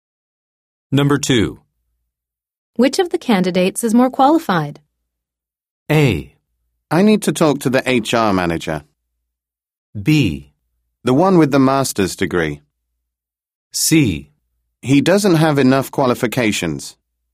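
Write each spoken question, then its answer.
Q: Which of the candidates is more qualified?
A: B: The one with the master's degree.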